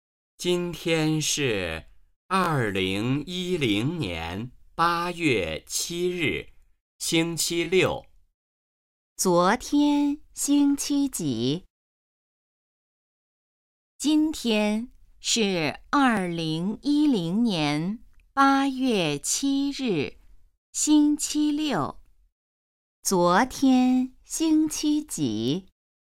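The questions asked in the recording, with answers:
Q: 昨天星期几?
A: 星期五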